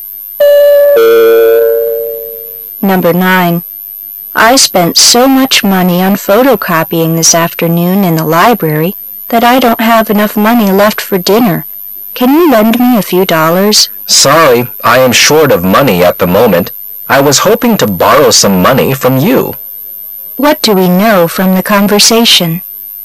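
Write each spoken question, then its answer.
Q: What do we know from the conversation?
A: Neither speaker has enough money to lend

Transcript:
[解析] W: I spent so much money on photocopying this afternoon in the library that I don't have enough money left for dinner. Can you lend me a few dollars? M: Sorry. I am short of money at the moment. I was hoping to borrow some money from you. Q: What do we know from the conversation?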